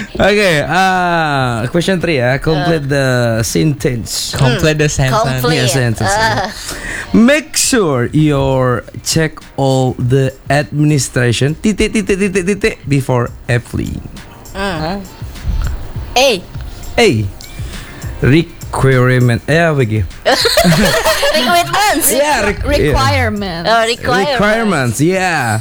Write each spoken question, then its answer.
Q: Complete the sentence.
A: It should be requirement.